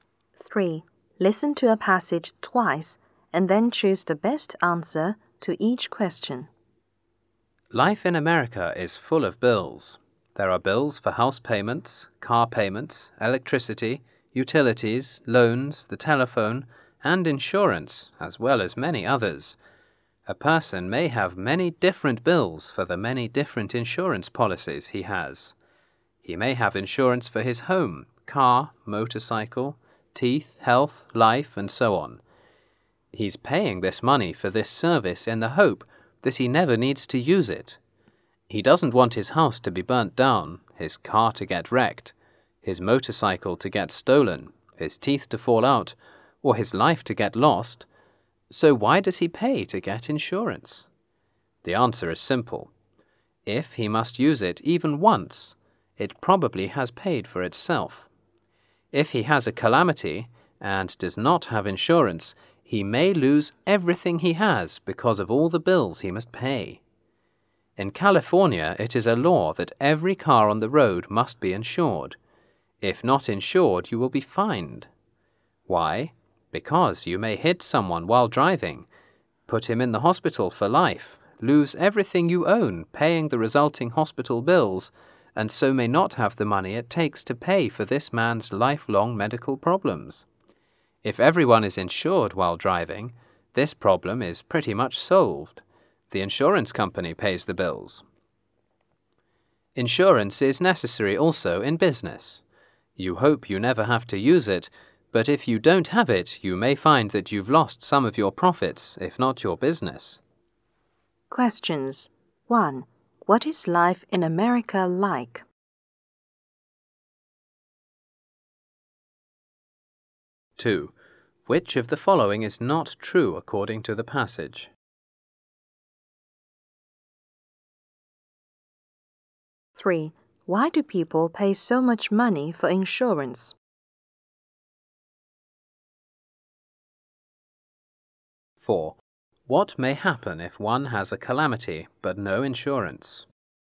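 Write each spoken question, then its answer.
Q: What is life in America like?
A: It is full of bills.

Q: What may happen if one has a calamity but no insurance?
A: He may lose everything he has because of all the bills he must pay.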